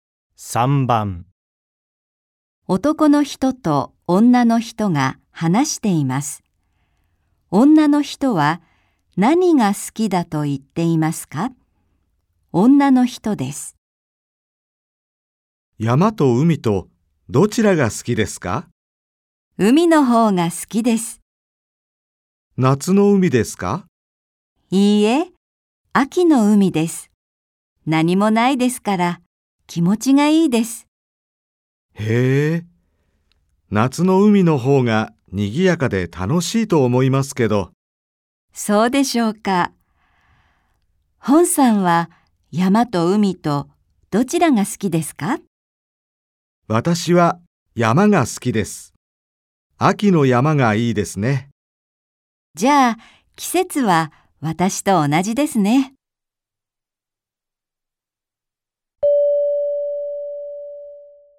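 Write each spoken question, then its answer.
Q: 女の人は何が好きだと言っていますか?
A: 秋の海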